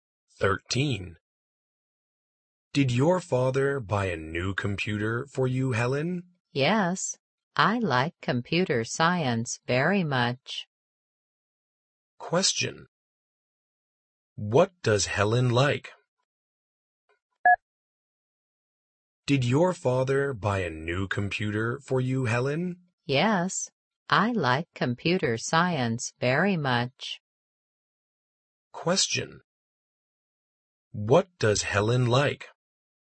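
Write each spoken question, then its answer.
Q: What does Helen like?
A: Computer science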